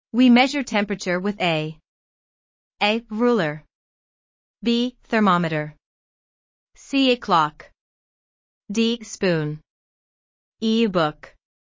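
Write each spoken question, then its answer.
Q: We measure temperature with a.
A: B: Thermometer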